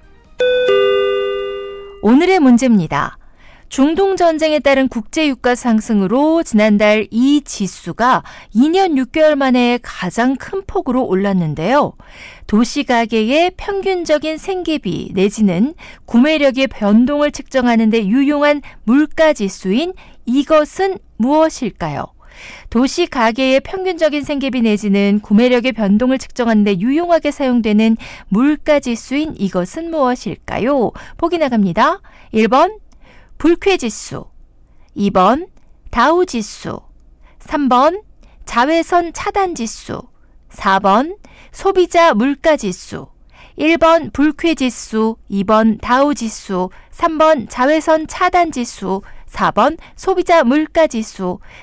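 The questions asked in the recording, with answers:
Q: 도시가계의 평균적인 생계비 내지는 구매력의 변동을 측정하는 데 유용하게 사용되는 물가지수인 이것은 무엇일까요?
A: 4: 소비자 물가지수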